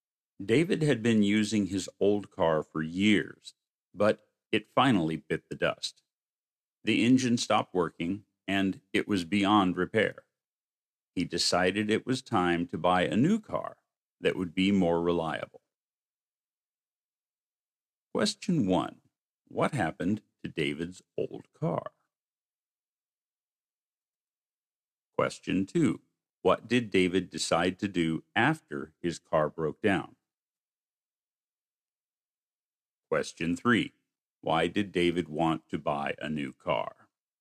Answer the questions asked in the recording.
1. The engine stopped working.
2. Purchase a new car.
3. Because his old car was beyond repair.